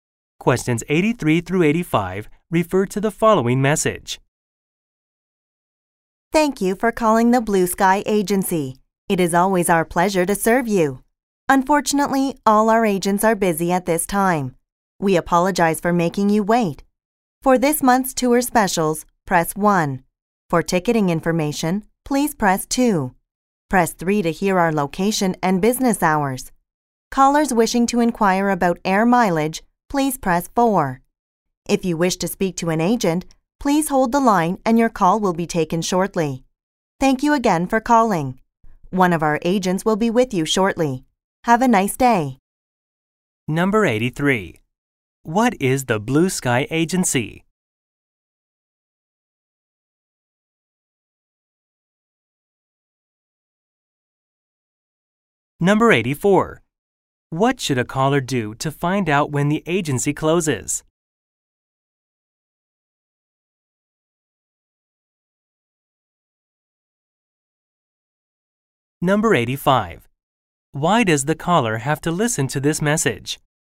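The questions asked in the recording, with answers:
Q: What is the Blue Sky Agency?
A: A travel agency

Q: What should a caller do to find out when the agency closes?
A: Press 3

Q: Why does the caller have to listen to this message?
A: All the agents are busy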